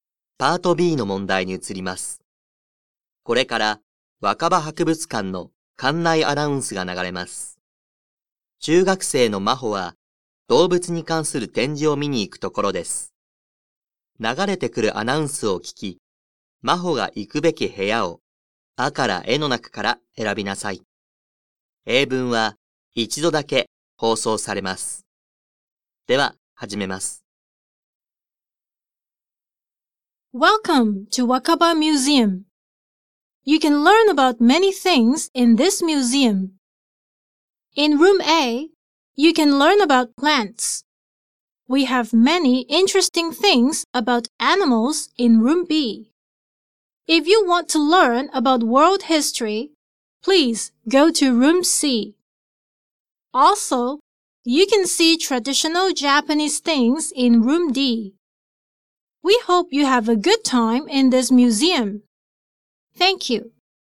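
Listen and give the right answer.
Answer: B: room B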